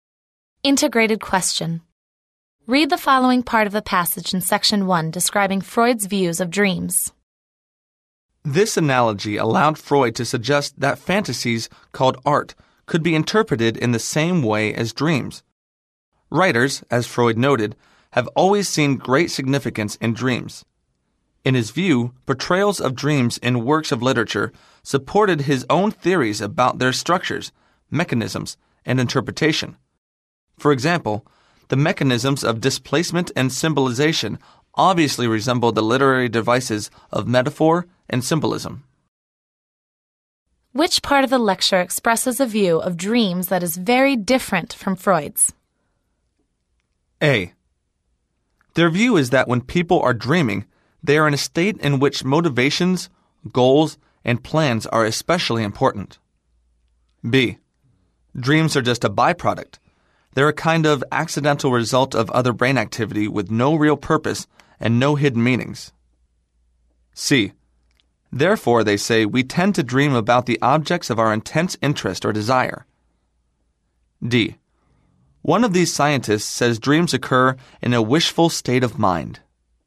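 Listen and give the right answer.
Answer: B: Dreams are just a byproduct. They're a kind of accidental result of other brain activity with no real purpose and no hidden meanings.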